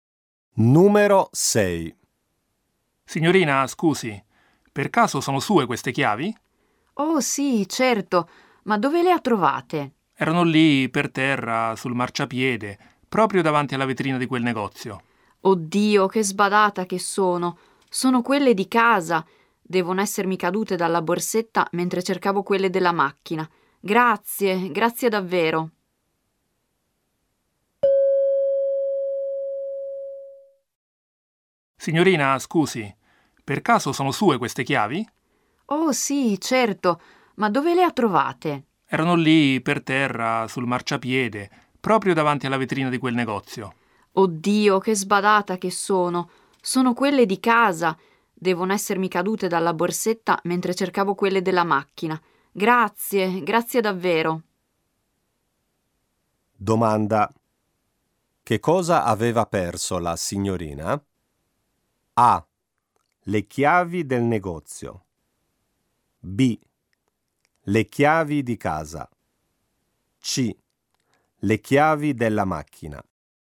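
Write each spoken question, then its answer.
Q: Che cosa aveva perso la signorina?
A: B: Le chiavi di casa.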